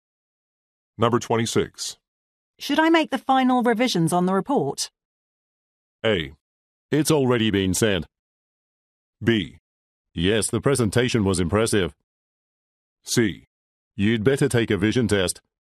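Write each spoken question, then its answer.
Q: Should I make the final revisions on the report?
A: A: It's already been sent.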